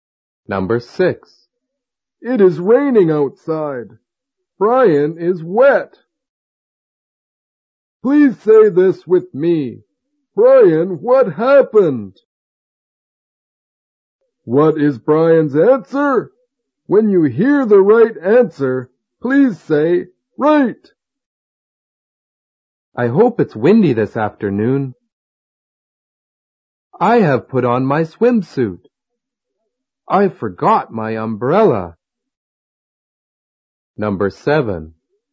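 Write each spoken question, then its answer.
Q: What is Brian's answer?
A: I forgot my umbrella.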